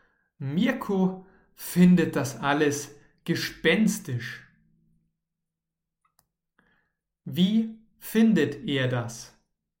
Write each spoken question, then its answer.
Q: Wie findet er das?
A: Er findet das alles gespenstisch.